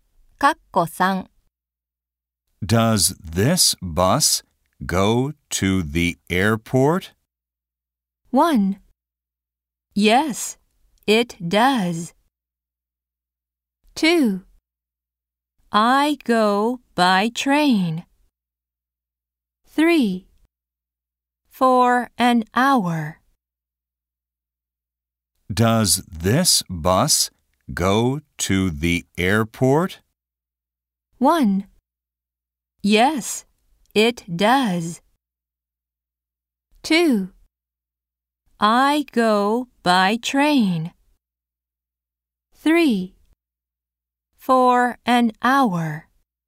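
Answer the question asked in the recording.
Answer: 1: Yes, it does.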